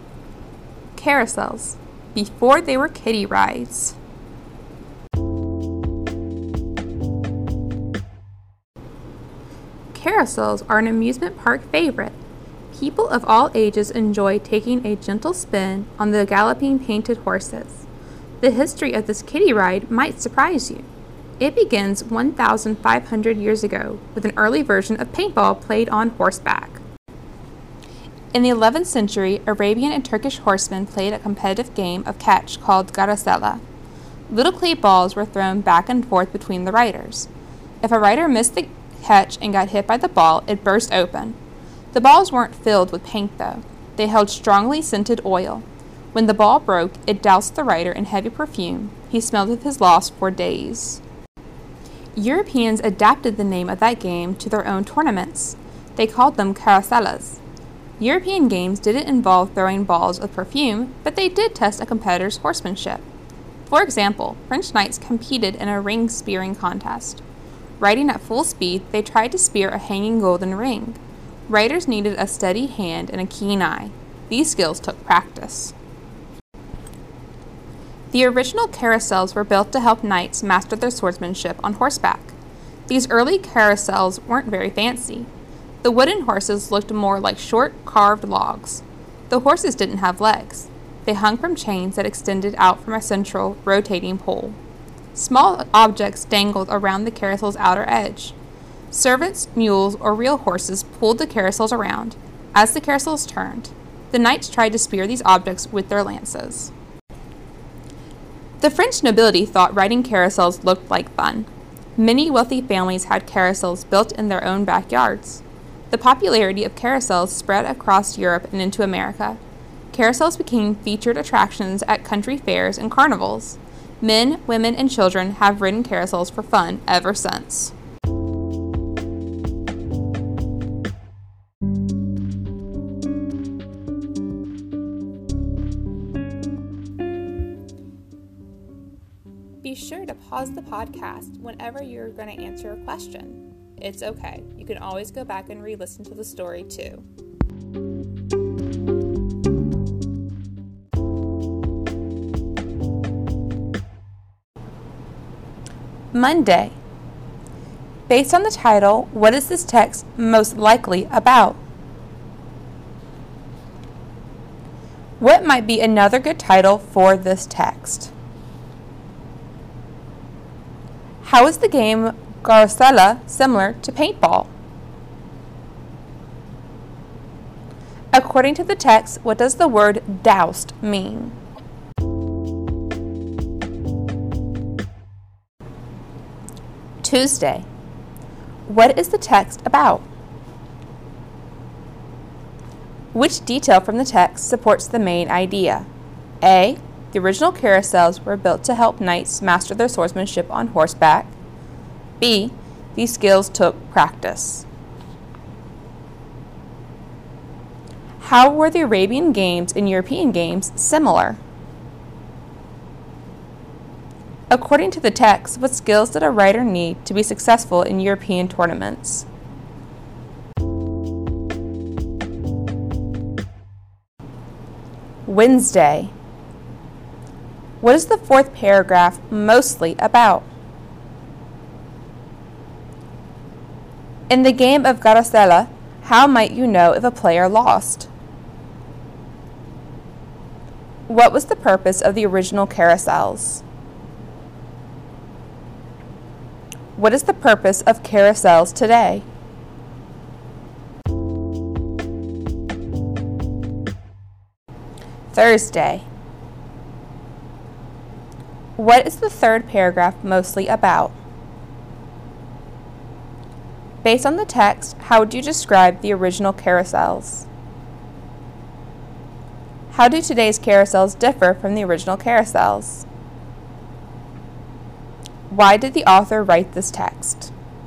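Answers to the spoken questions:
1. What carousels were before they became kiddie rides (the history of carousels)
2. Riders threw balls at each other that burst open when they hit someone
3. Soaked or covered (in perfume)
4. The history of carousels
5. A: The original carousels were built to help knights master their swordsmanship on horseback.
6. Both were played on horseback and tested horsemanship
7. A steady hand and a keen eye
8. He would smell of strong perfume for days
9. To help knights master their swordsmanship on horseback
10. Fun and amusement
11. Plain, not fancy: legless log-like wooden horses hanging from chains, pulled around by servants, mules or horses
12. To inform readers about the history of carousels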